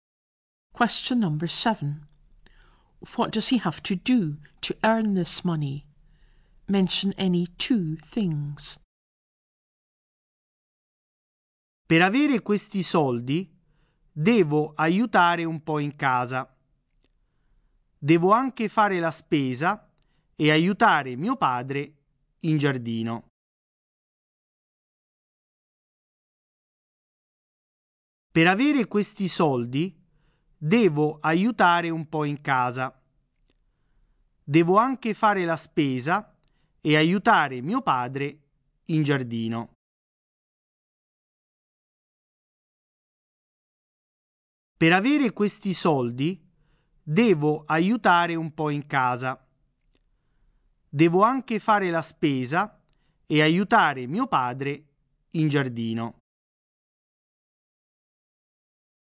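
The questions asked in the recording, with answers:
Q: What does he have to do to earn this money?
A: Help a bit at home, do the shopping, help his father in the garden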